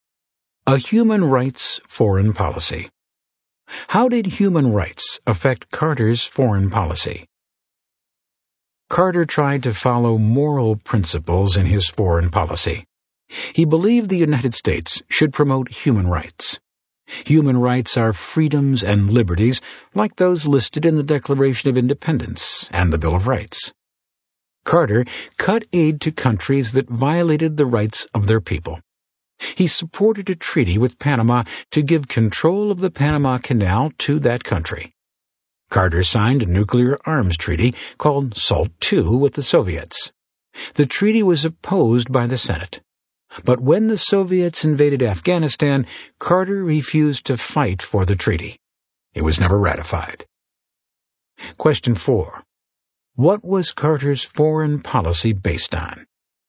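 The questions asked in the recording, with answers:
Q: What was Carter's foreign policy based on?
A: Moral principles and human rights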